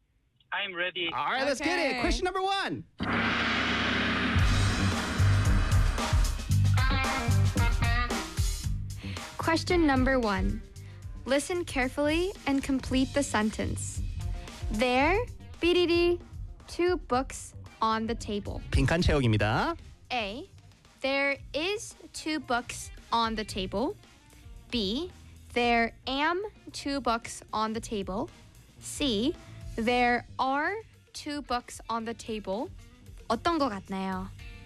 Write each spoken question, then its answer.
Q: There, bididi, two books on the table.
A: 네, 정답은 C입니다.